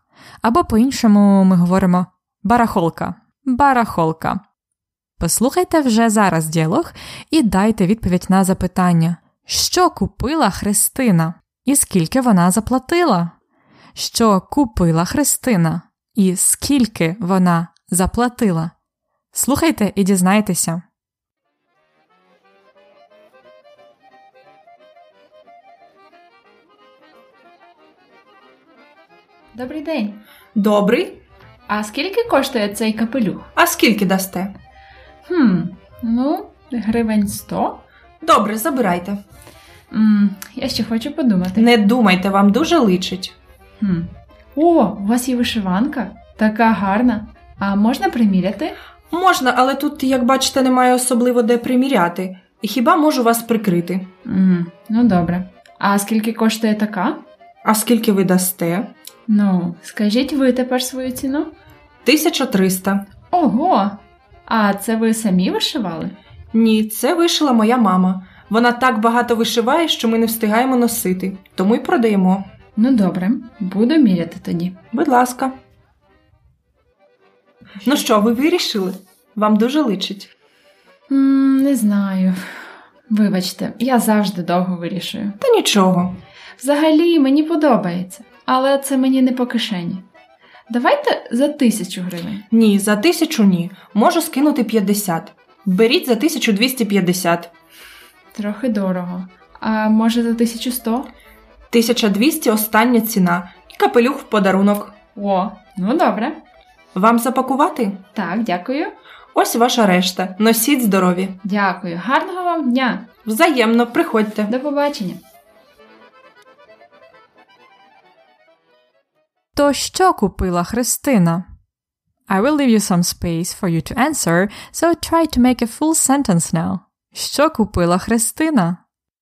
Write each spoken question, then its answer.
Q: Що купила Христина і скільки вона заплатила?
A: Христина купила вишиванку і капелюх.